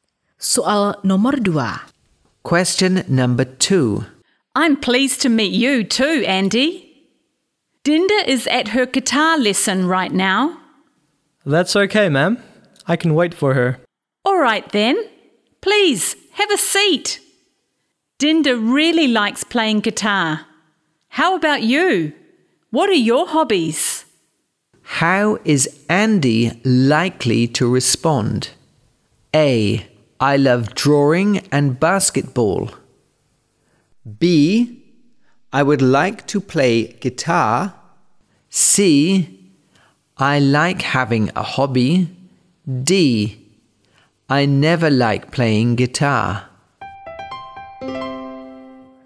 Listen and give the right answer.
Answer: A. I love drawing and basketball.